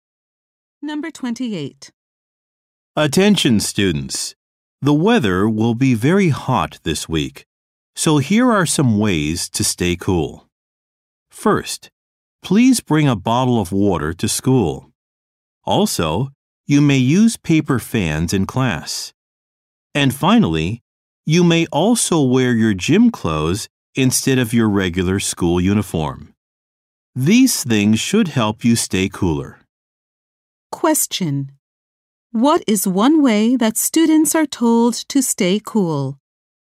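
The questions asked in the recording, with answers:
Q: What is one way that students are told to stay cool?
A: Bring water, use paper fans, or wear gym clothes.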